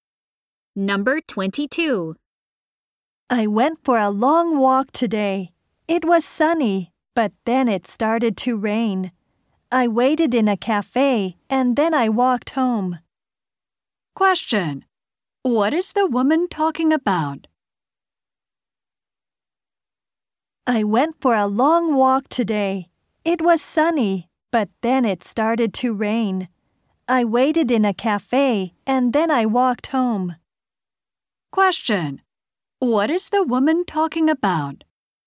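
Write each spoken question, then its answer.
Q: What is the woman talking about?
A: Her long walk today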